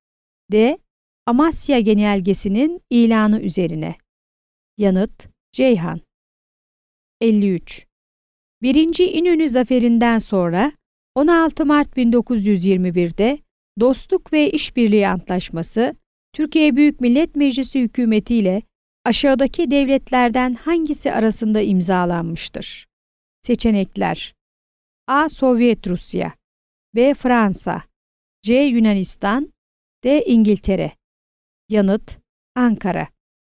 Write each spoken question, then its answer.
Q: 1. İnönü Zaferi'nden sonra 16 Mart 1921'de Dostluk ve İşbirliği Antlaşması, Türkiye Büyük Millet Meclisi Hükümeti ile aşağıdaki devletlerden hangisi arasında imzalanmıştır?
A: Yanıt: Ankara.